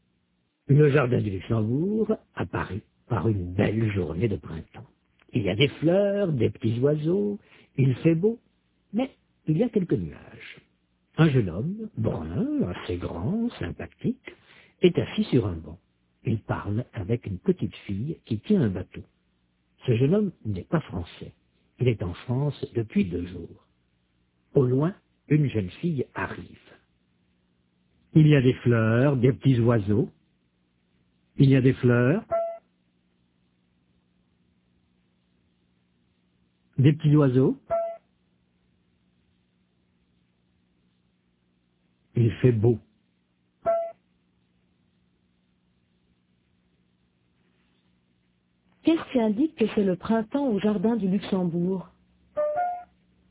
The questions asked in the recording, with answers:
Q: Qu'est-ce qui indique que c'est le printemps au jardin du Luxembourg?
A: Il y a des fleurs, des petits oiseaux.